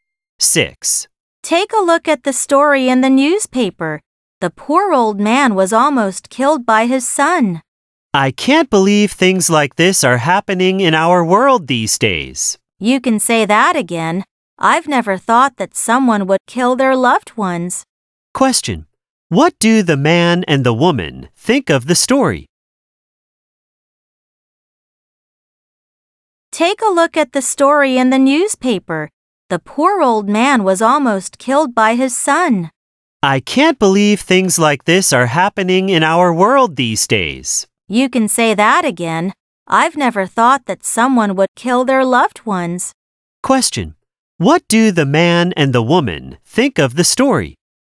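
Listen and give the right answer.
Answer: They find it shocking and hard to believe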